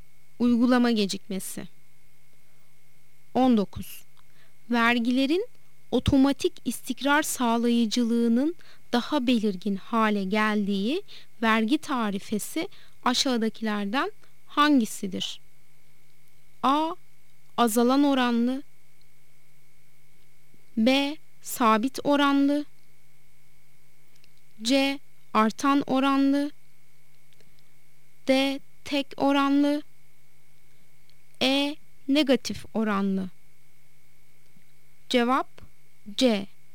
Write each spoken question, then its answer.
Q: Vergilerin otomatik istikrar sağlayıcılığının daha belirgin hale geldiği vergi tarifesi aşağıdakilerden hangisidir?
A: Cevap C. Artan oranlı.